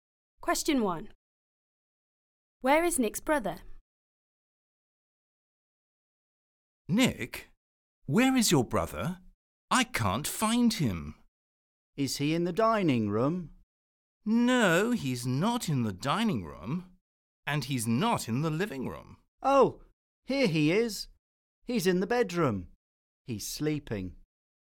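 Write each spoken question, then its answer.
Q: Where is Nick's brother?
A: In the bedroom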